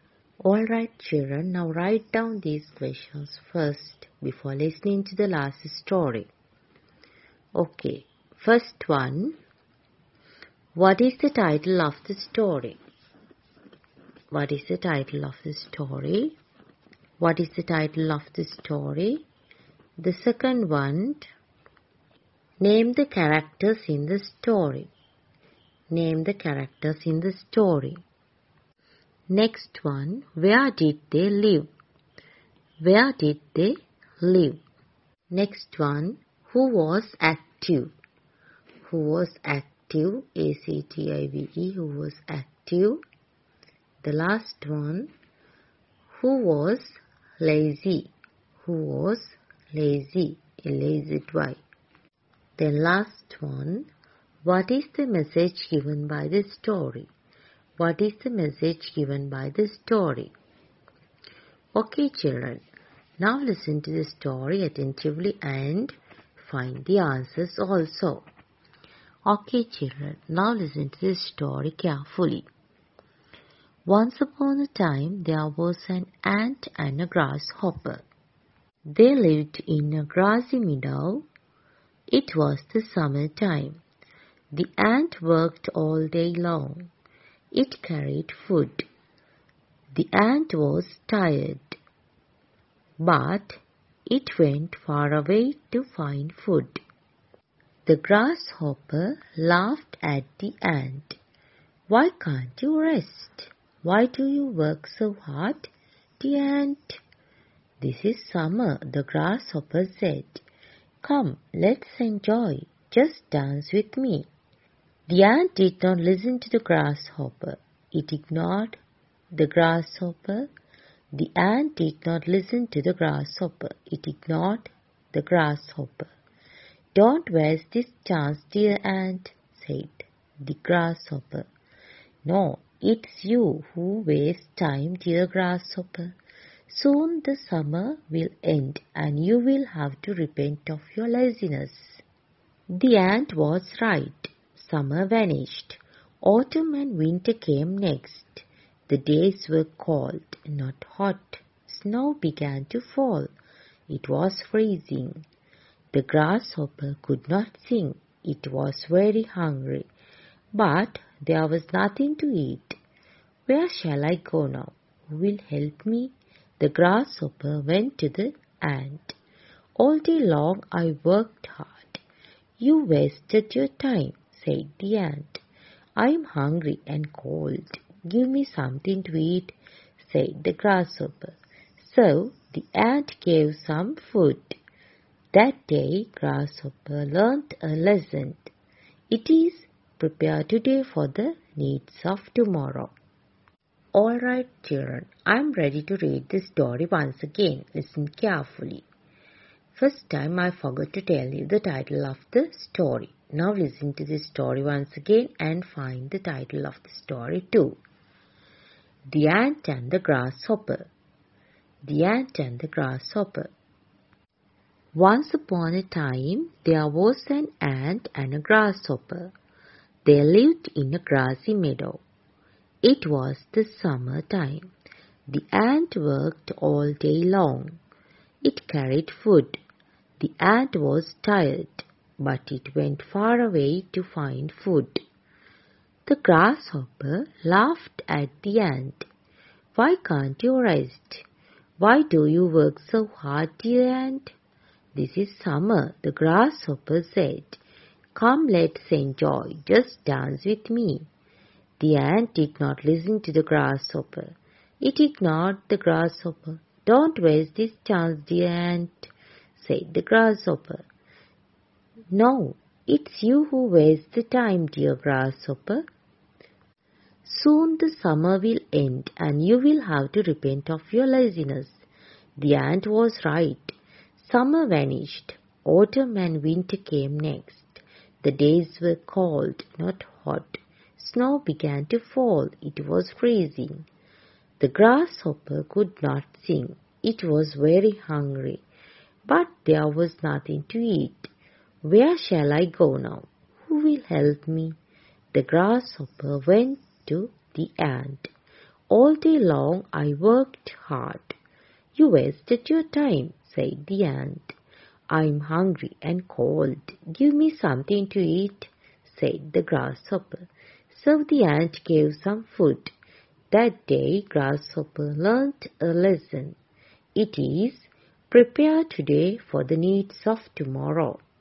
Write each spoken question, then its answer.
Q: what is the title of the story?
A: Yes, The Ant and the Grasshopper.

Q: name the characters in the story.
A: Yes, the ant and the grasshopper.

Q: who was active?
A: Yes, the ant was active

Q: who was lazy?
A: the grasshopper was lazy.

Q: what is the message given by the story?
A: Yes, prepare today for the needs of tomorrow.